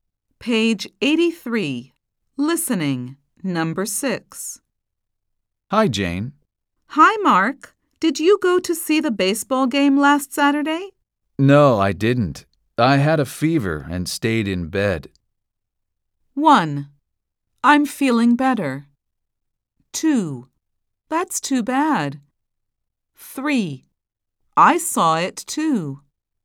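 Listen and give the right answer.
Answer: 2: That's too bad.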